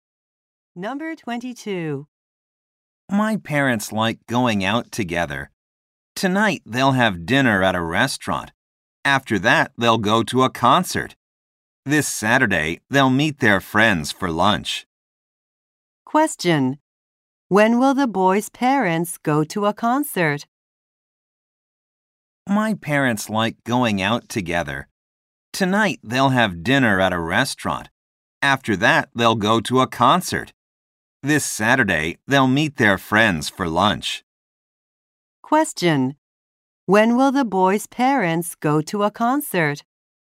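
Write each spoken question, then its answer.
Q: When will the boy's parents go to a concert?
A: Tonight.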